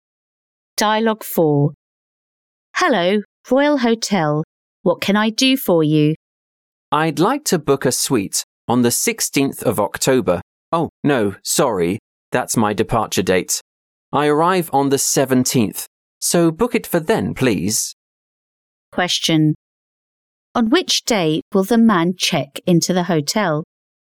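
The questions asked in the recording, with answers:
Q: On which day will the man check into the hotel?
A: October 17th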